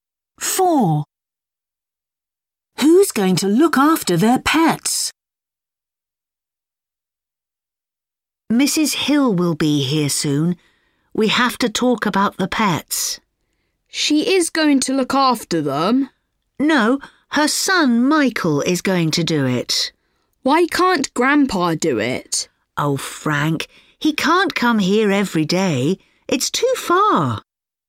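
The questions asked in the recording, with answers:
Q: Who's going to look after their pets?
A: Michael, Mrs. Hill's son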